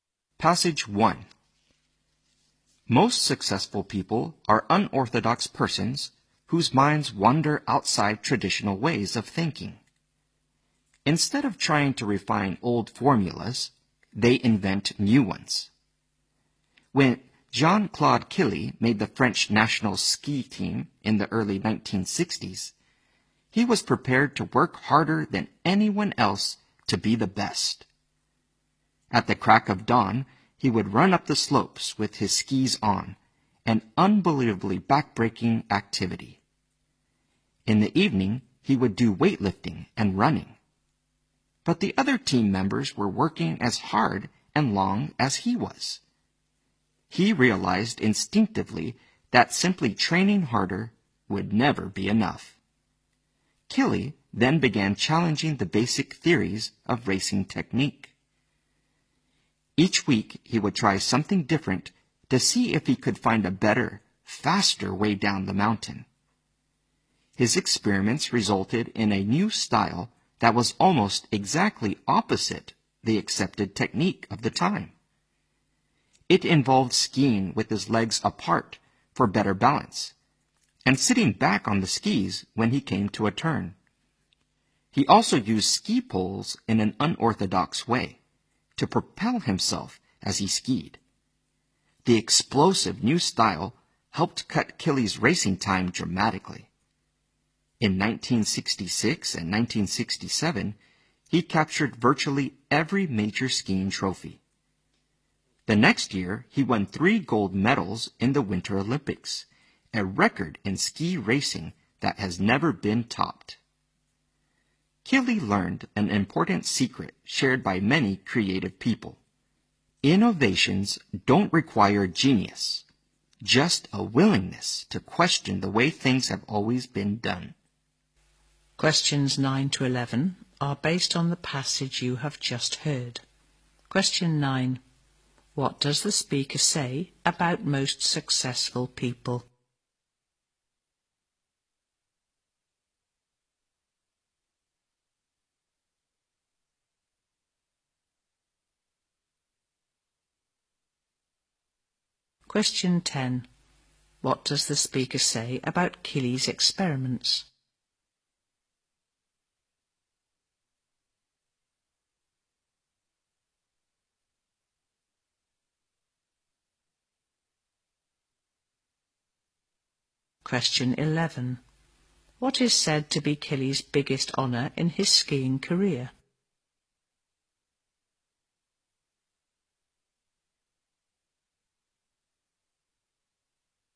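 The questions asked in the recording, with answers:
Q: What does the speaker say about most successful people?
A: They think outside traditional ways of thinking

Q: What does the speaker say about Keeley's experiments?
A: They resulted in a new style almost opposite the accepted technique

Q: What is said to be Keeley's biggest honour in his skiing career?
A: Winning 3 gold medals in the Winter Olympics, a record never topped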